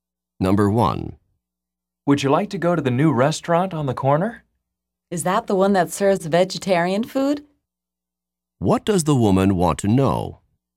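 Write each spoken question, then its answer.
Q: What does the woman want to know?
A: Whether the new restaurant serves vegetarian food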